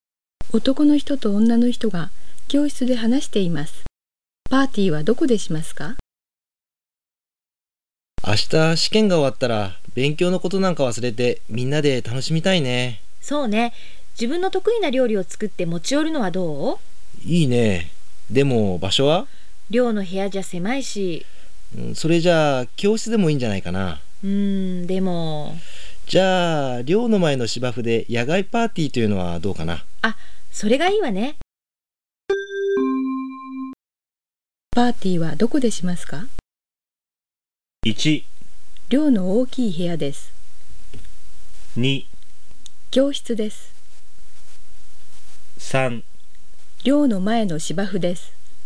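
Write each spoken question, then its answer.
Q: パーティーはどこでしますか?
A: 3: 寮の前の芝生です。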